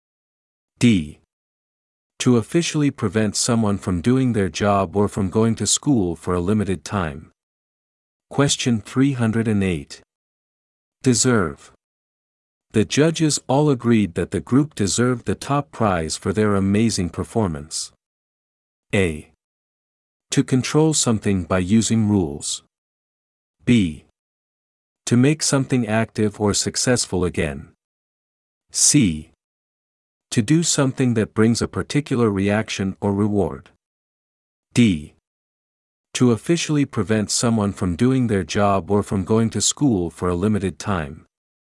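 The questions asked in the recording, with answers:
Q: Deserve. The judges all agreed that the group deserved the top prize for their amazing performance.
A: C: To do something that brings a particular reaction or reward.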